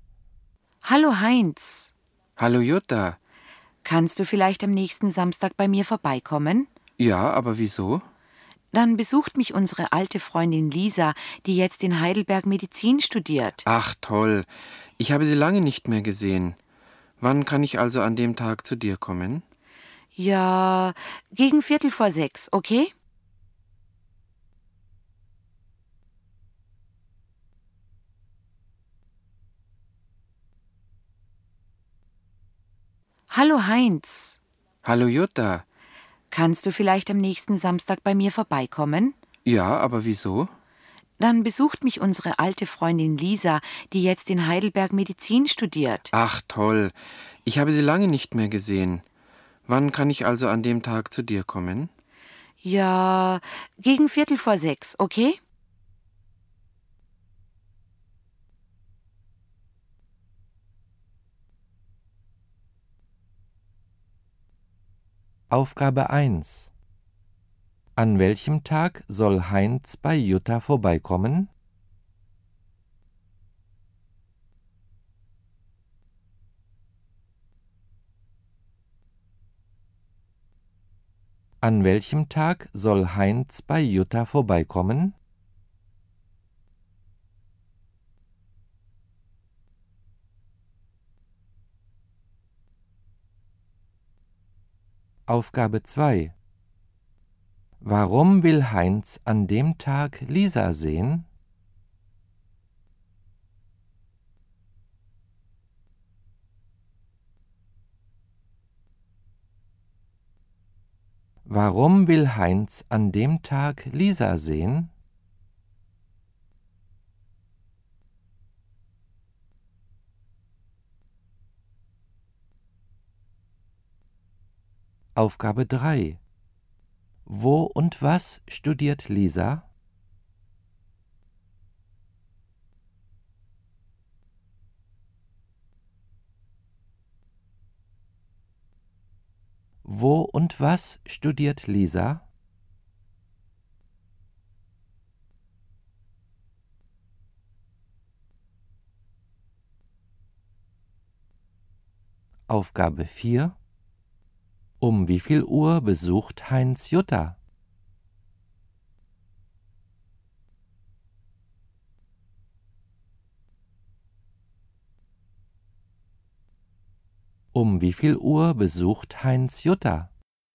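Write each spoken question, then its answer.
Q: An welchem Tag soll Heinz bei Jutta vorbeikommen?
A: Am nächsten Samstag

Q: Warum will Heinz an dem Tag Lisa sehen?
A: Er hat sie lange nicht mehr gesehen

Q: Wo und was studiert Lisa?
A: In Heidelberg, Medizin

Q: Um wie viel Uhr besucht Heinz Jutta?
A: Gegen 5:45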